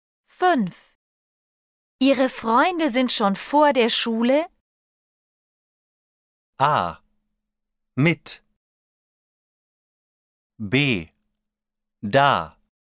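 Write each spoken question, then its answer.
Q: Ihre Freunde sind schon vor der Schule... A. Mit. B. Da.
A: B: Da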